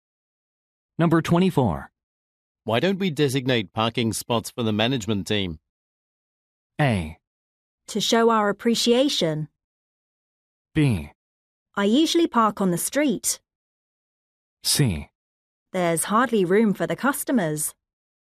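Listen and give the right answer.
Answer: C: There's hardly room for the customers.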